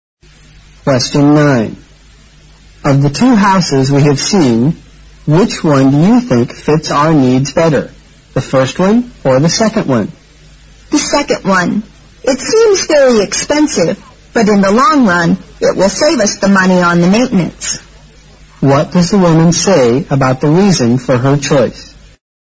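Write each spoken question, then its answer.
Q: What does the woman say about the reason for her choice?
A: The second house will save them money on maintenance in the long run, even though it seems expensive.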